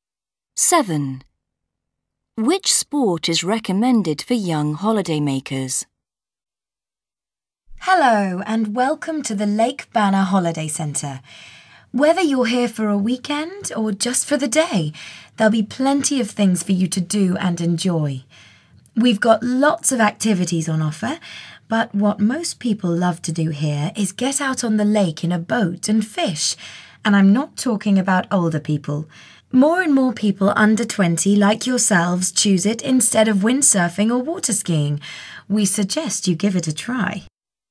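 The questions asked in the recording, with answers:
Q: Which sport is recommended for young holidaymakers?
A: fishing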